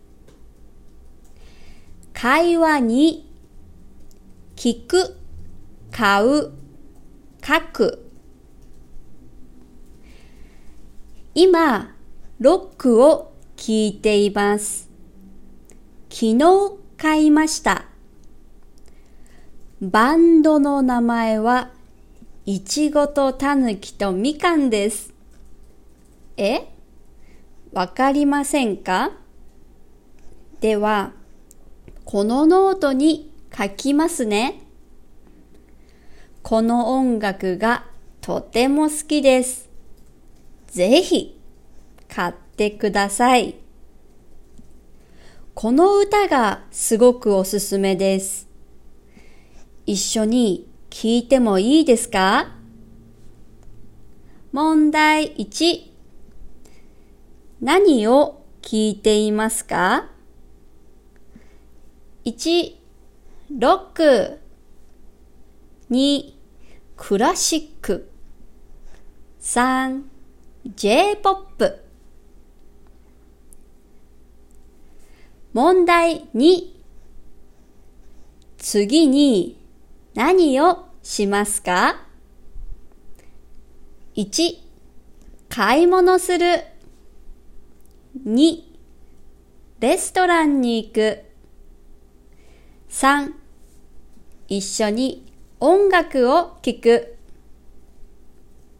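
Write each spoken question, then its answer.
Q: 何を聞いていますか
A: 1: ロック

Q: 次に何をしますか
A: 3: 一緒に音楽を聴く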